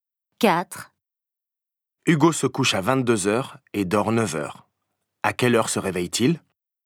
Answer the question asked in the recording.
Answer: 7h.